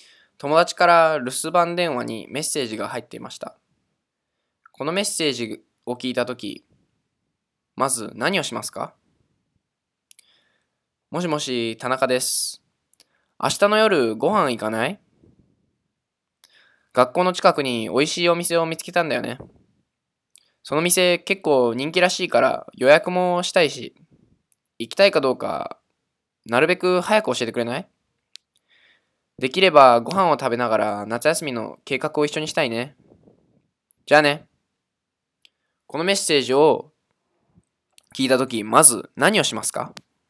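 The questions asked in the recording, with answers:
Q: このメッセージを聞いたとき、まず何をしますか?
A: 田中さんに、明日の夜ご飯に行くかどうか早く連絡する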